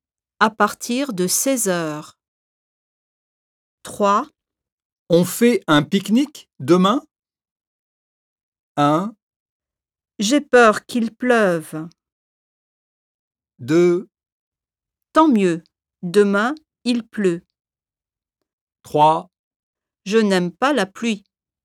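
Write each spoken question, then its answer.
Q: On fait un pique-nique demain?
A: 1: J'ai peur qu'il pleuve.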